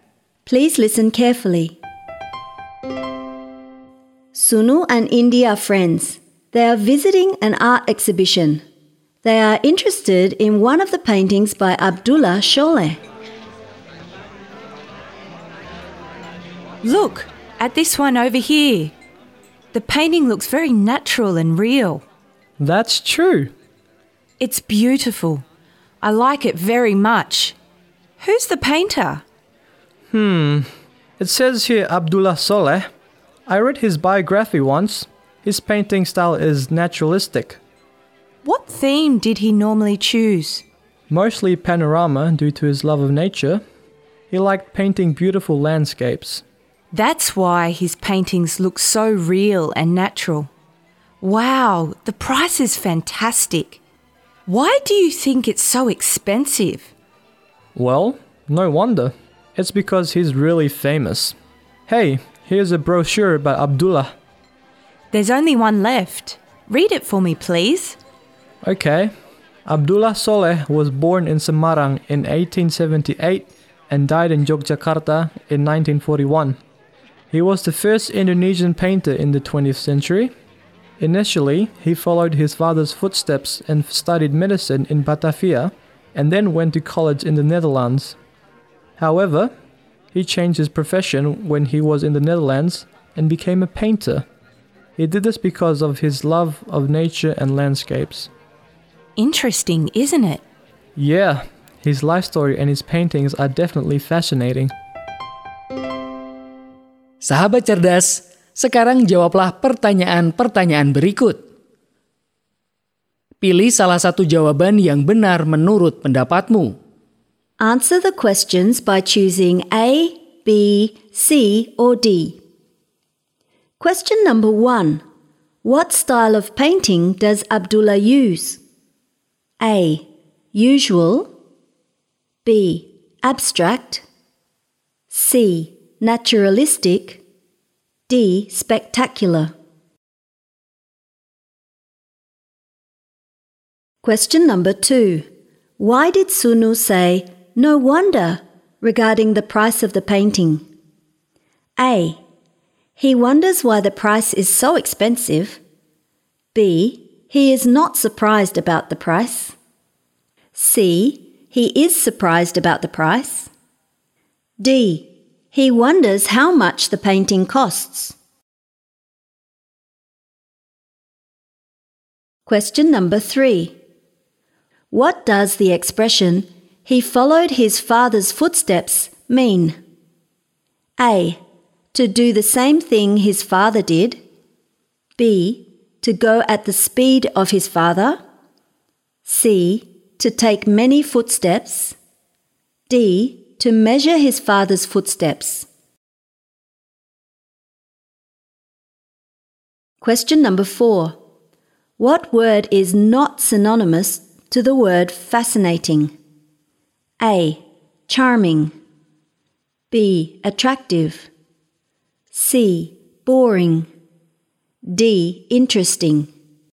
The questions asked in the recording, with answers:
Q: What style of painting does Abdullah use?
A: C. Naturalistic.

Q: Why did Sunu say, "No wonder," regarding the price of the painting?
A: B. He is not surprised about the price.

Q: What does the expression, "He followed his father's footsteps," mean?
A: A. To do the same thing his father did.

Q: What word is not synonymous to the word fascinating?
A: C. Boring.